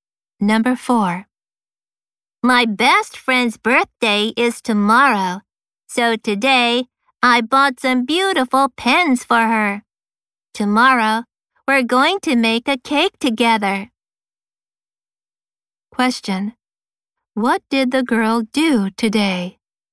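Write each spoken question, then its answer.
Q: What did the girl do today?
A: She bought some beautiful pens for her friend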